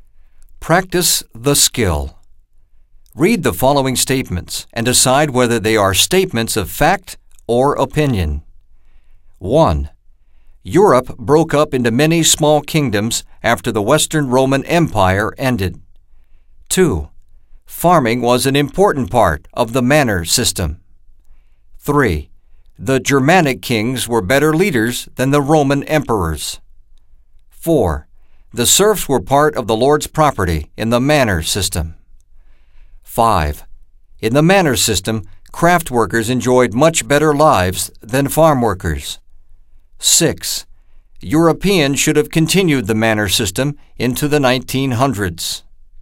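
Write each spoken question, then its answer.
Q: Europe broke up into many small kingdoms after the Western Roman Empire ended.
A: fact

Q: Farming was an important part of the manor system.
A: fact

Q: The Germanic kings were better leaders than the Roman emperors.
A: opinion

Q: The serfs were part of the lord's property in the manor system.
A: fact

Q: In the manor system, craft workers enjoyed much better lives than farm workers.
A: opinion

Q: Europeans should have continued the manor system into the 1900s.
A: opinion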